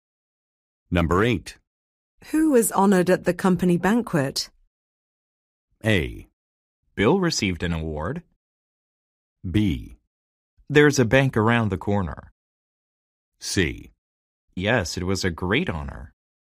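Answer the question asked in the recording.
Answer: A: Bill received an award.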